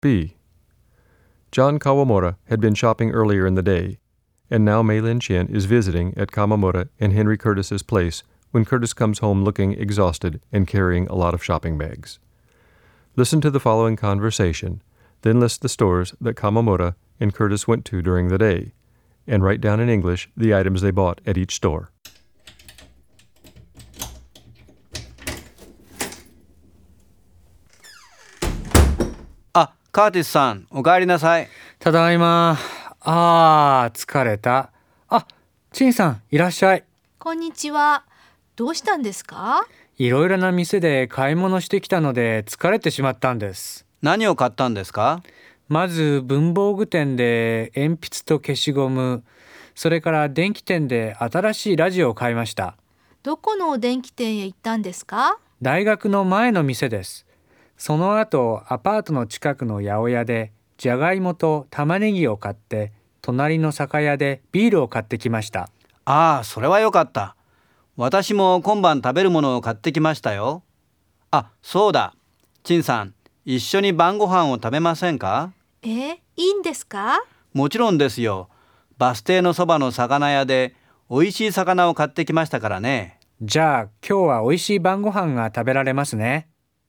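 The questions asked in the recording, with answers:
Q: Listen to the following conversation, then list the stores that Kawamura and Curtis went to during the day, and write down in English the items they bought at each store.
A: Stationery store: pencils and an eraser; electronics store: a new radio; greengrocer: potatoes and onions; liquor store: beer; fish shop: fish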